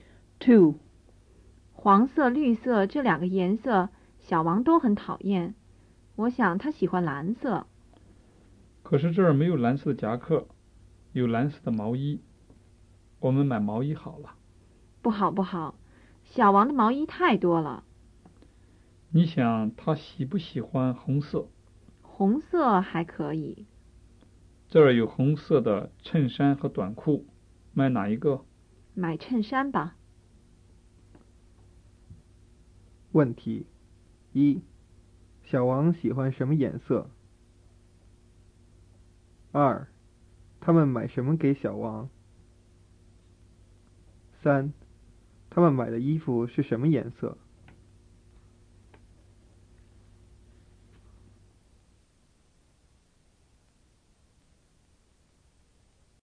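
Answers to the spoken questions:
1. 蓝色
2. 衬衫
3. 红色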